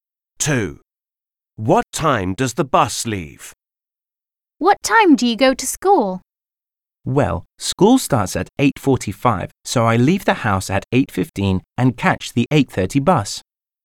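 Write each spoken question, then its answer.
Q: What time does the bus leave?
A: 8:30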